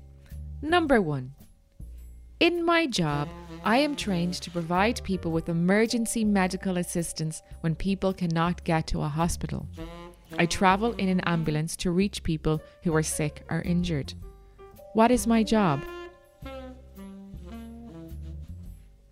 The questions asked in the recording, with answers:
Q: What is my job?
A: I'm a paramedic.